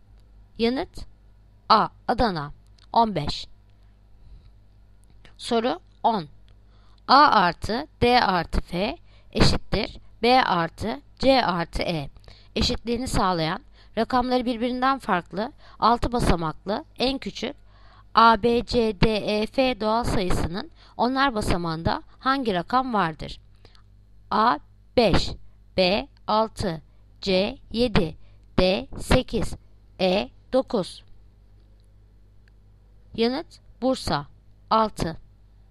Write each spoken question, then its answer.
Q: Eşitliğini sağlayan rakamları birbirinden farklı 6 basamaklı en küçük A, B, C, D, E, F doğal sayısının onlar basamağında hangi rakam vardır?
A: Yanıt Bursa 6.